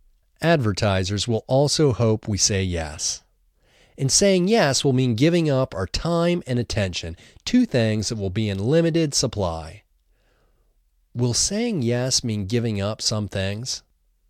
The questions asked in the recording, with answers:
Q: Will saying yes mean giving up some things?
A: Yes, saying yes will mean giving up some things.